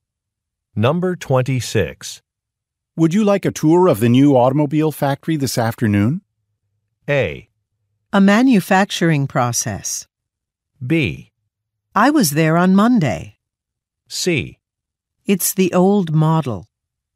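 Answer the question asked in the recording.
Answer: B: I was there on Monday.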